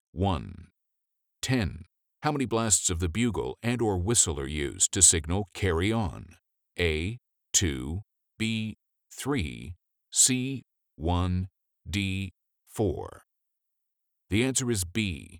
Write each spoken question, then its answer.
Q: How many blasts of the bugle and or whistle are used to signal carry on?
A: The answer is B. 3.